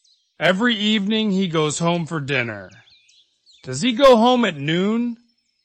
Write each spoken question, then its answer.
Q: Does he go home at noon?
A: No, he doesn't.